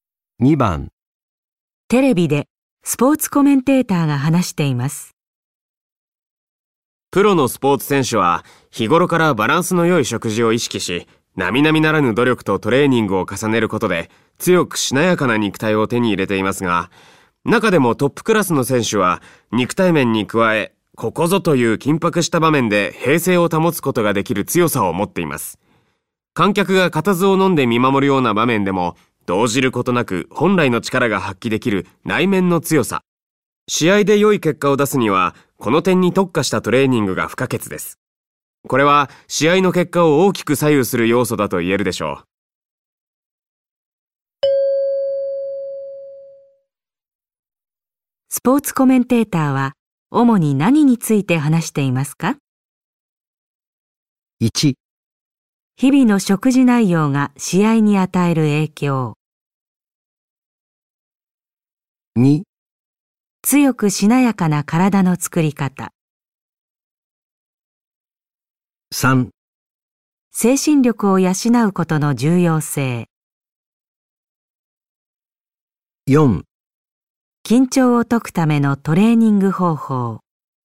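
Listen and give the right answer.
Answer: 3: 精神力を養うことの重要性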